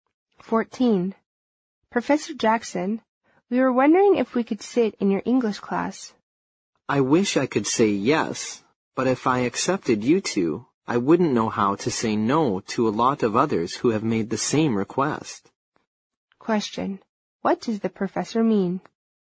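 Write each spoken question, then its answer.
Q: What does the professor mean?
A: He can't let them sit in his class, because he would then have to accept many others who asked the same.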